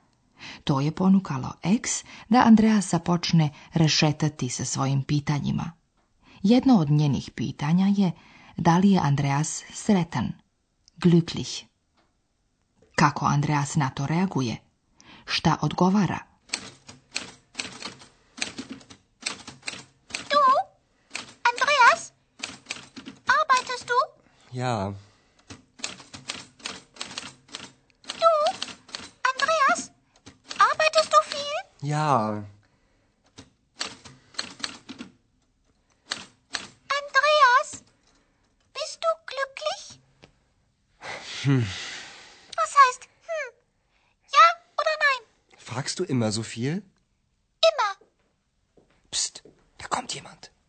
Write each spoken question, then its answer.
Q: Kako Andreas na to reaguje?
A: Na pitanje koje je postavila X, Andreas je promrmljao nešto neodređeno i uzvratio X protupitanjem.